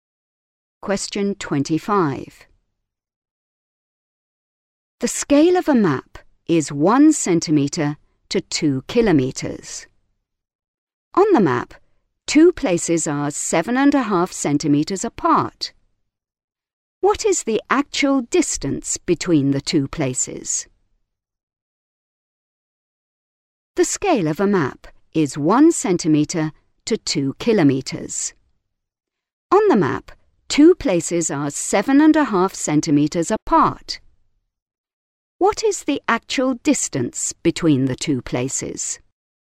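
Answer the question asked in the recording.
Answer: 15 kilometres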